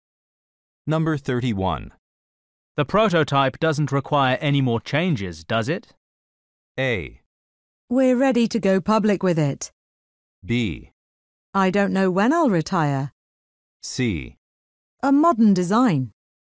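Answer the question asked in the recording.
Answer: A: We're ready to go public with it.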